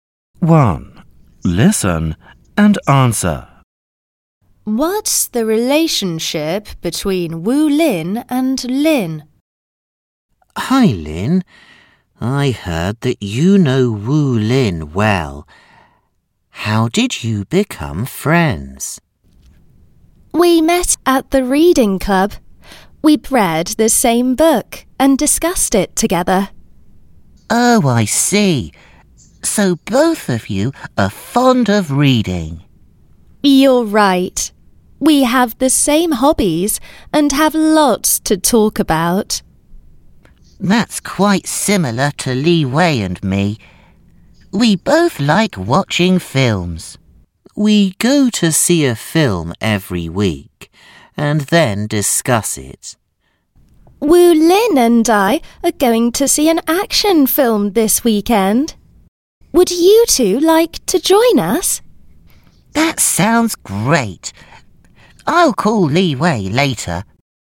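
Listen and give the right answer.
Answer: They are friends.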